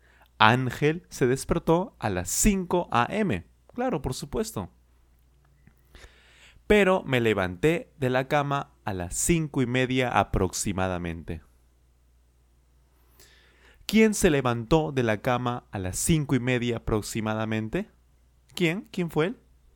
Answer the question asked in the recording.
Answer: Ángel. Por supuesto, Ángel se levantó de la cama a las cinco y media aproximadamente.